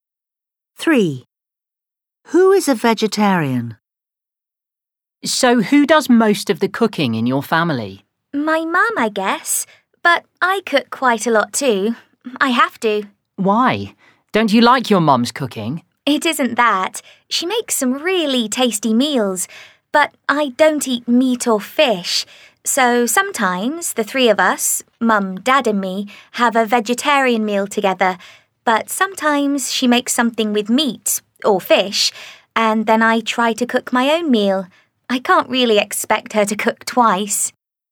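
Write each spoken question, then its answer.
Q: Who is a vegetarian?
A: the speaker answering (the child), not the parents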